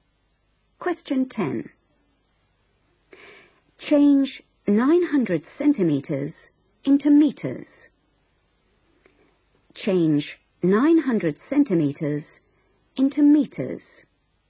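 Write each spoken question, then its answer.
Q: Change 900 centimeters into meters.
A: 9 meters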